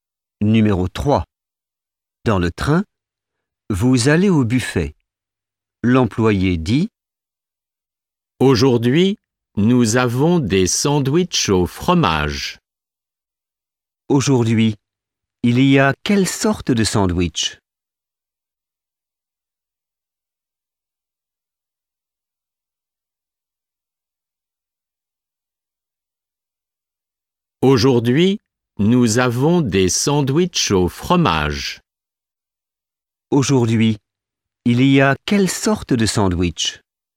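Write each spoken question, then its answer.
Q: Aujourd'hui, il y a quelle sorte de sandwich?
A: Des sandwichs au fromage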